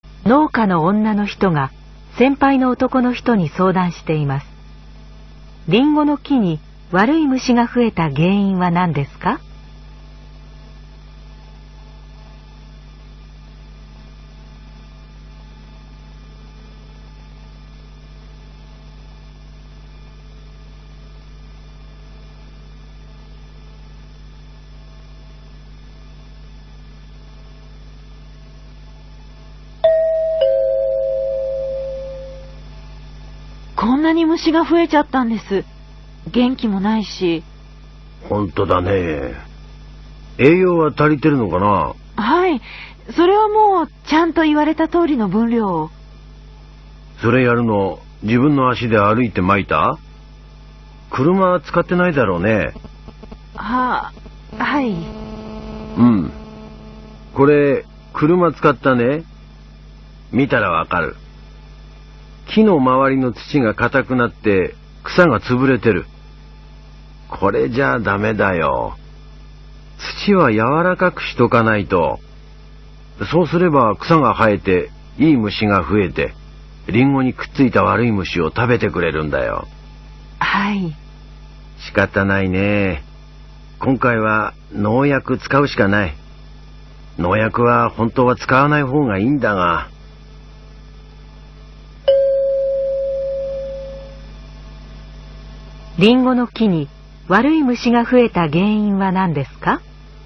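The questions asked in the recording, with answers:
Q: リンゴの木に悪い虫が増えた原因は何ですか?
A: 車を使って土が硬くなり、草が潰れて、悪い虫を食べるいい虫が減ったから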